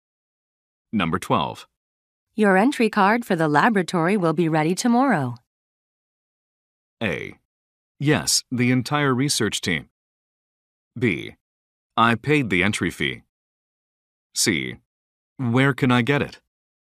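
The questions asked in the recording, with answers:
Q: Your entry card for the laboratory will be ready tomorrow.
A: C: Where can I get it?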